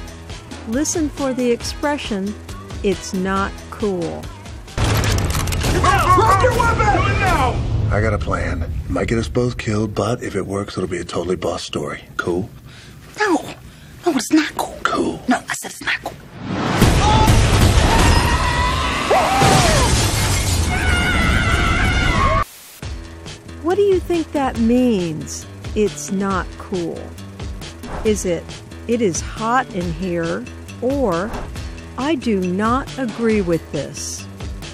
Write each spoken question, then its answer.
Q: What do you think that means, it's not cool?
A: It's not cool means I do not agree with this.